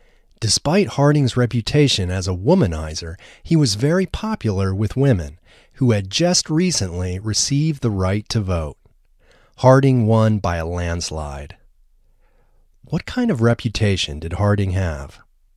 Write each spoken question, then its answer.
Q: What kind of reputation did Harding have?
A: Harding's reputation was as a womanizer.